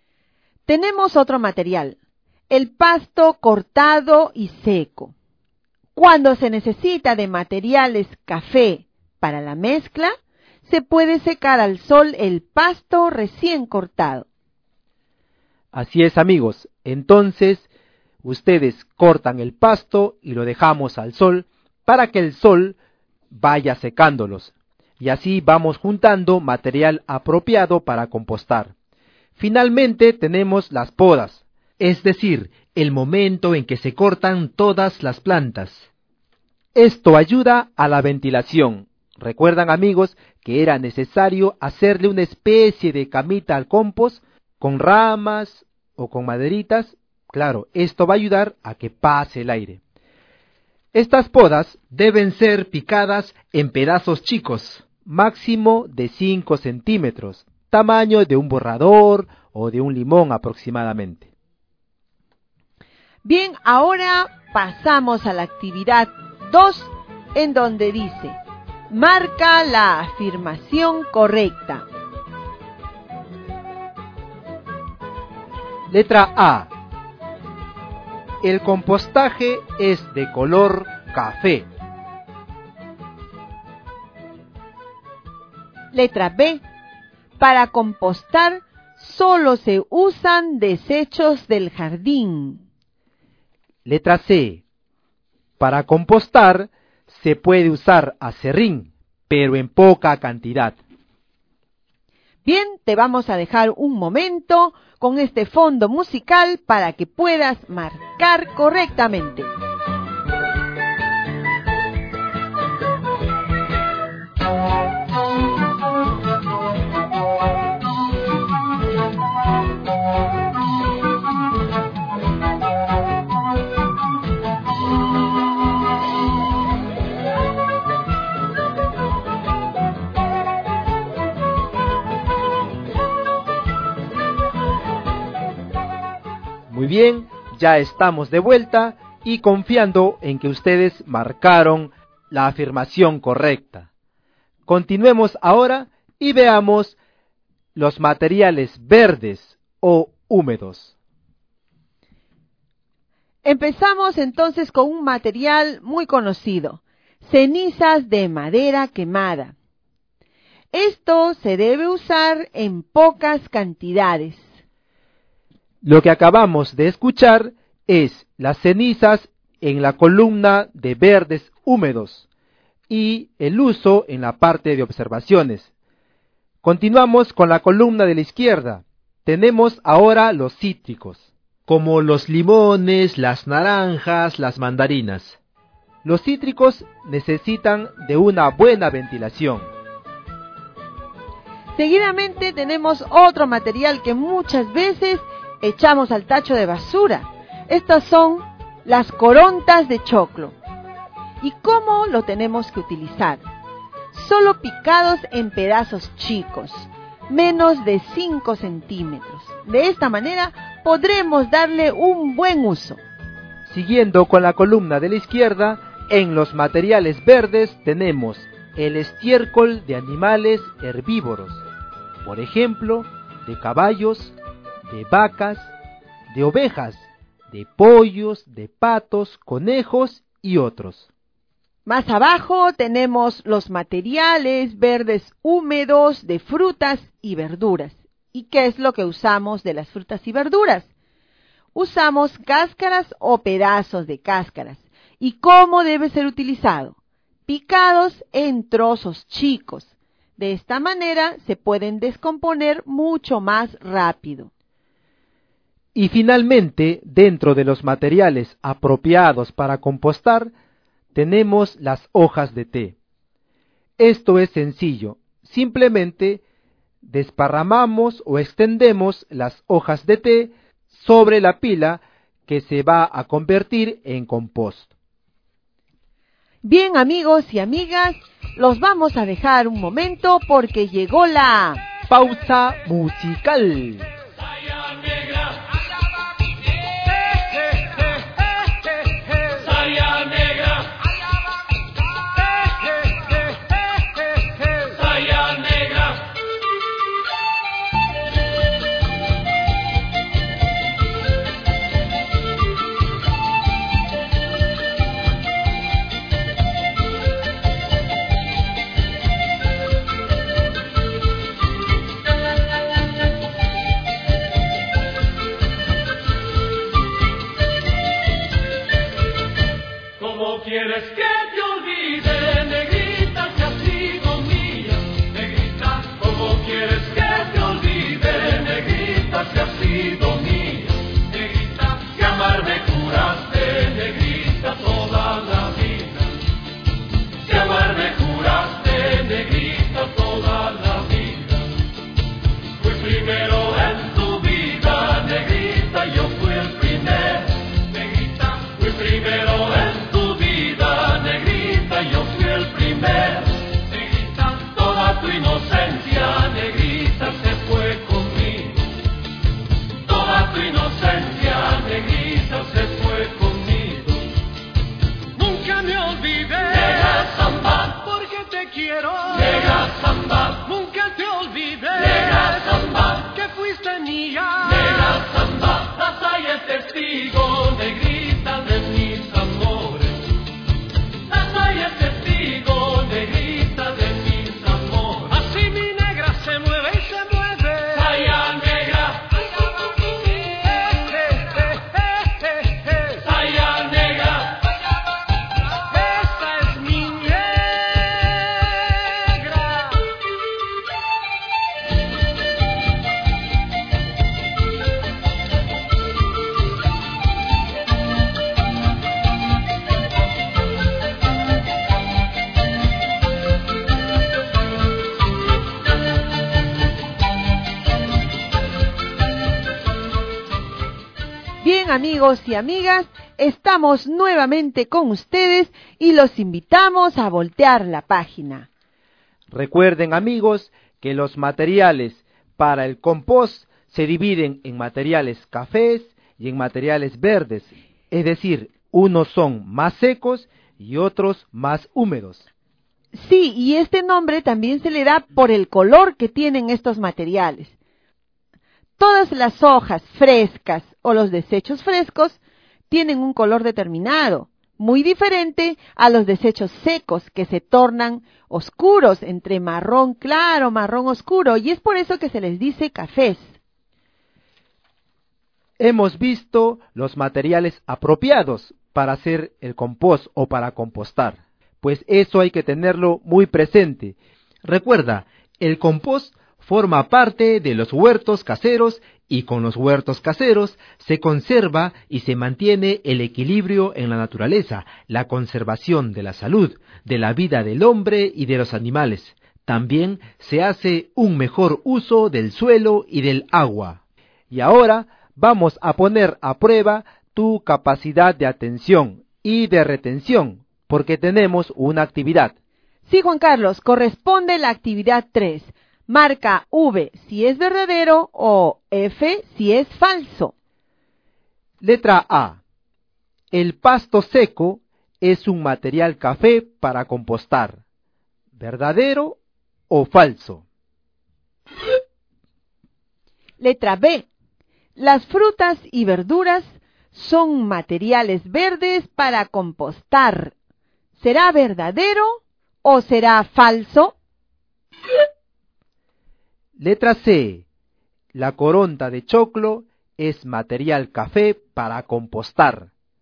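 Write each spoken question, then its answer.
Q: El pasto seco es un material café para compostar. ¿Verdadero o falso?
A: Verdadero

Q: Las frutas y verduras son materiales verdes para compostar. ¿será verdadero o será falso?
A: Verdadero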